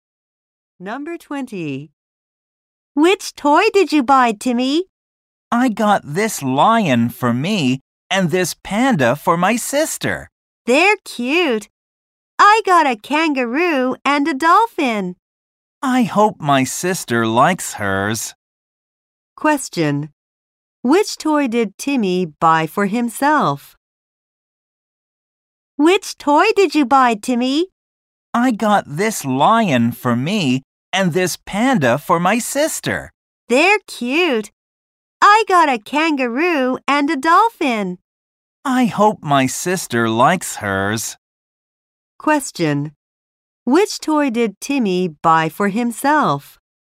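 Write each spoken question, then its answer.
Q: Which toy did Timmy buy for himself?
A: A lion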